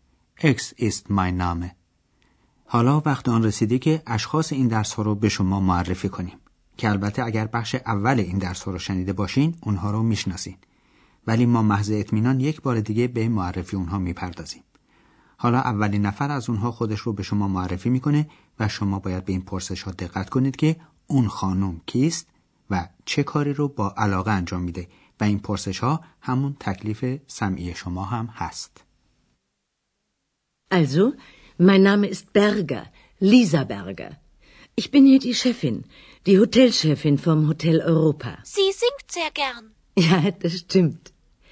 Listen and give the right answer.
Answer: پس ایشون خانم برگر مدیره هتل اروپا بود